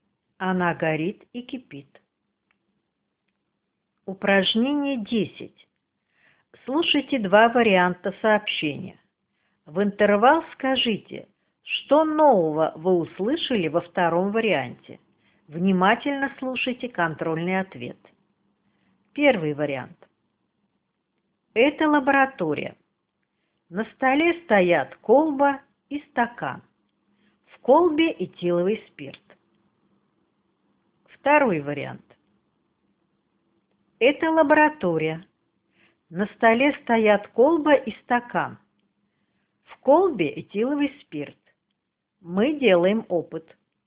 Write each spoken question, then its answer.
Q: В интервал скажите, что нового вы услышали во втором варианте.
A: Мы делаем опыт.